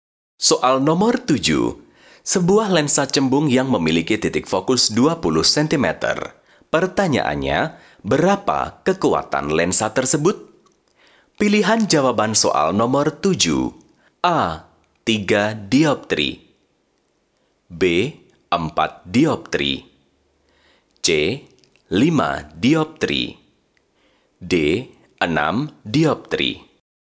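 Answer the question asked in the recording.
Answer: C: 5 dioptri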